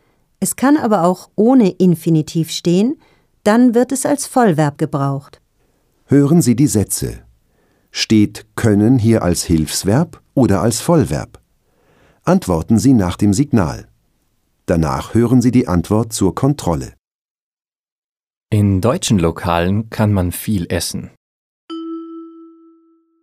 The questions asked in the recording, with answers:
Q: Steht können hier als Hilfsverb oder als Vollverb?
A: Hilfsverb. Essen können.